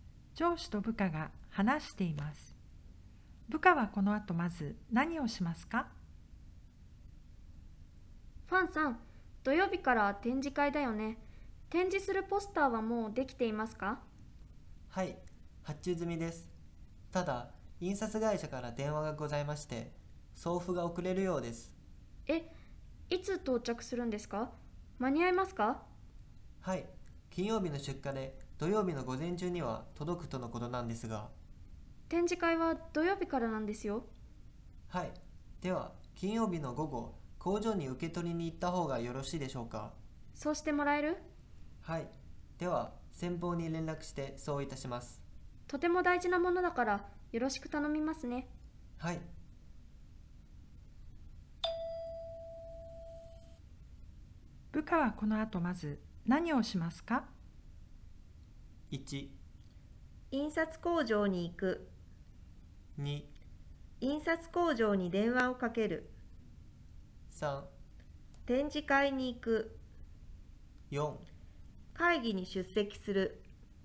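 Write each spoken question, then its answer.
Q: 部下はこの後まず何をしますか?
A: 2: 印刷工場に電話をかける。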